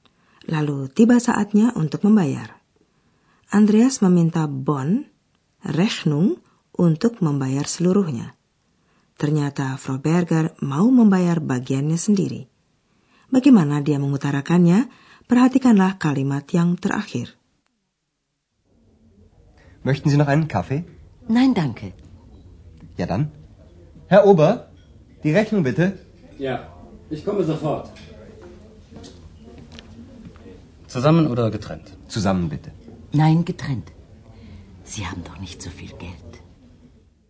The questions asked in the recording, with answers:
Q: Bagaimana dia mengutarakannya?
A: Tetapi Frau Berger membantah, tidak, sendiri-sendiri saja.